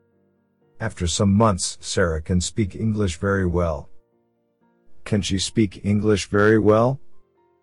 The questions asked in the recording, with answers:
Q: Can she speak English very well?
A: Yes, she can.